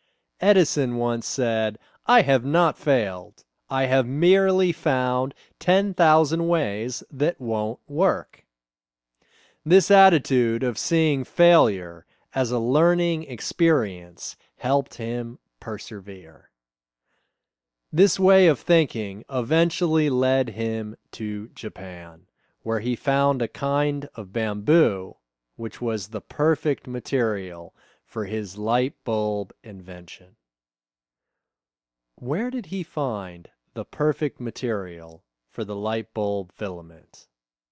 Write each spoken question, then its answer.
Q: Where did he find the perfect material for the light bulb filament?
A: He found the perfect material for the light bulb filament in Japan.